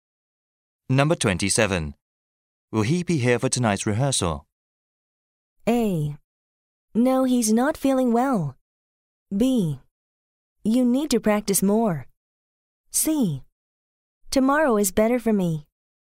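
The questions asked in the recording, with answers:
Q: Will he be here for tonight's rehearsal?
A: A: No, he's not feeling well.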